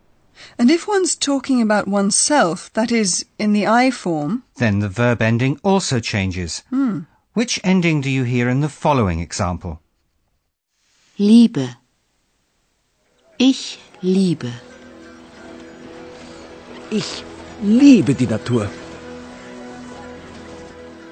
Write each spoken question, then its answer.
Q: Which ending do you hear in the following example?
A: When ich, that is I, is used, the ending has to be e.